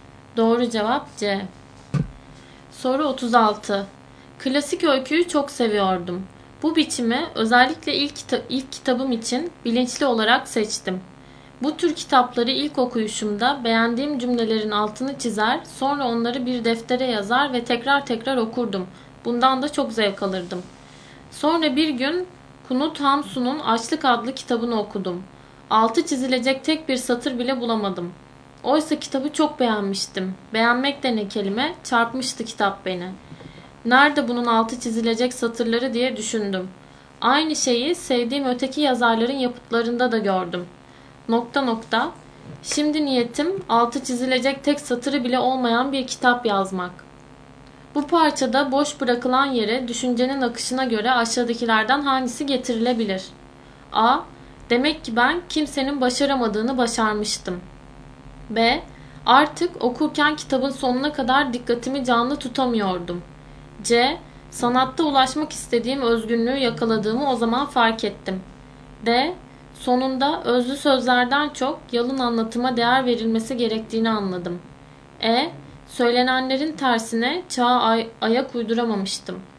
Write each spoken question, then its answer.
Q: Bu parçada boş bırakılan yere düşüncenin akışına göre aşağıdakilerden hangisi getirilebilir?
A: Doğru cevap D.